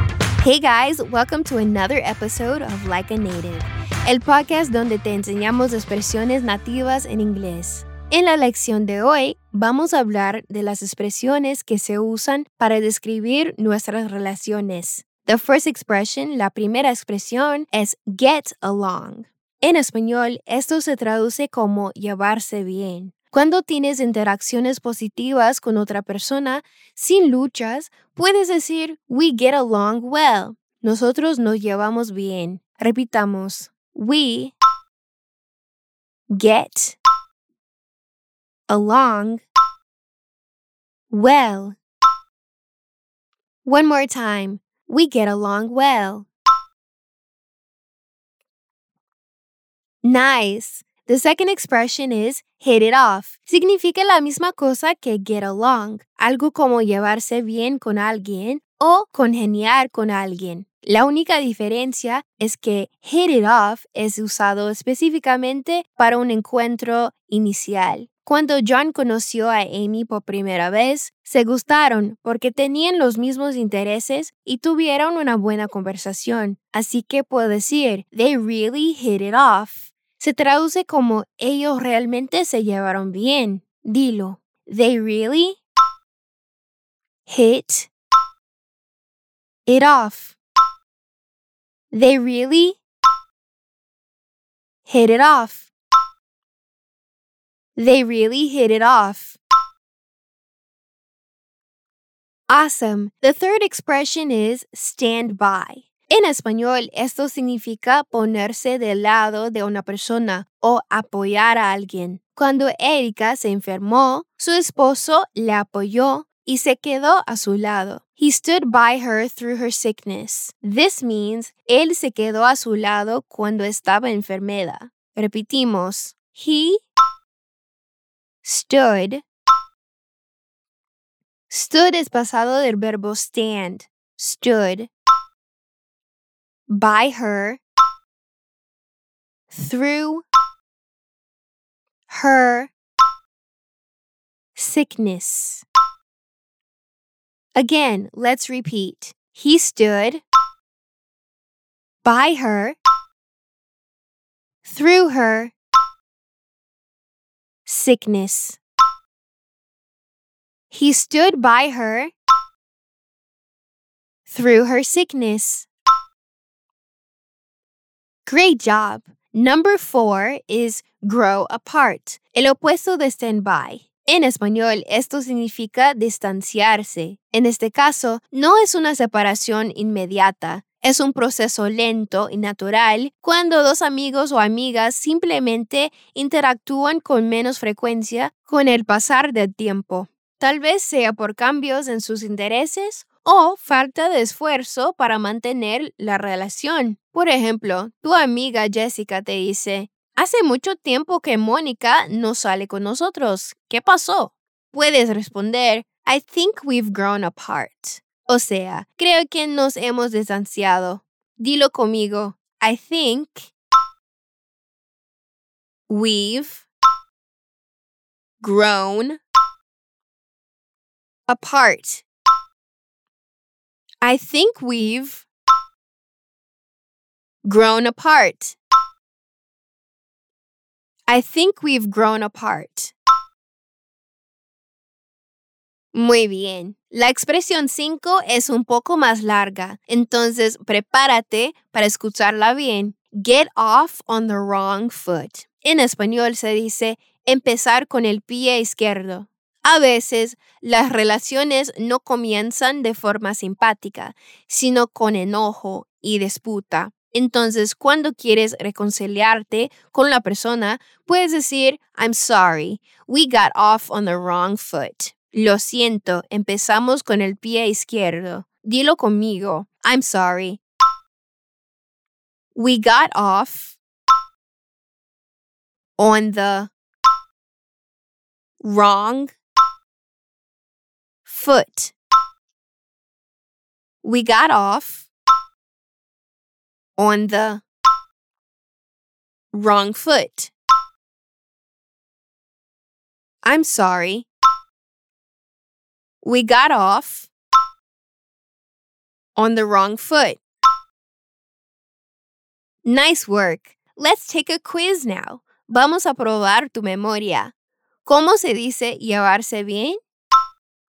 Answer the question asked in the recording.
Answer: Get along.